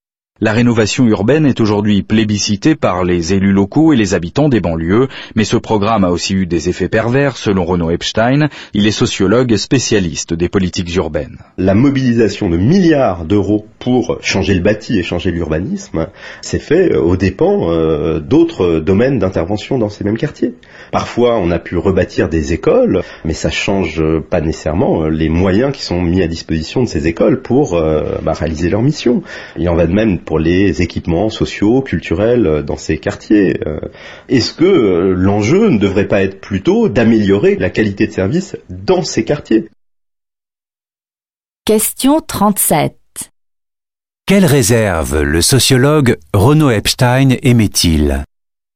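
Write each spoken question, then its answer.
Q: Quelle réserve le sociologue Renaud Epstein émet-il ?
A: Les milliards investis dans le bâti et l'urbanisme l'ont été aux dépens d'autres interventions, comme la qualité des services (écoles, équipements sociaux et culturels)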